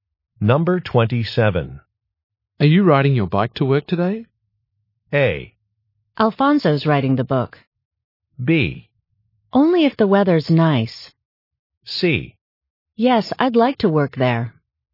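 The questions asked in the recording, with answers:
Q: Are you riding your bike to work today?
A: B: Only if the weather's nice.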